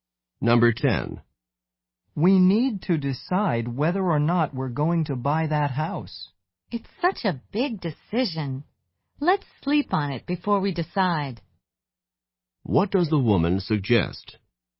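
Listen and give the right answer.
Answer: Waiting until tomorrow to decide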